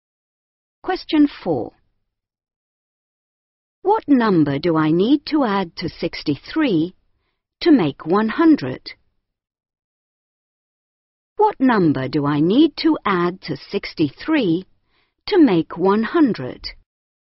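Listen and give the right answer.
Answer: 37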